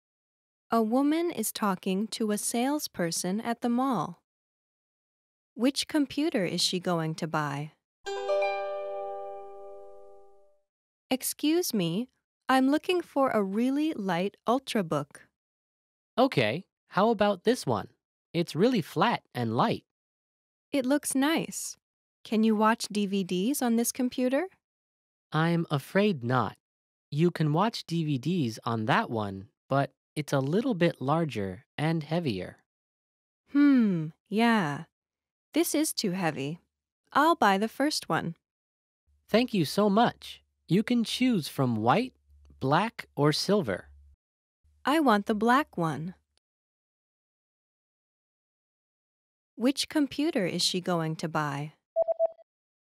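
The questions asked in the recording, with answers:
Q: Which computer is she going to buy?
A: The light, flat ultrabook in black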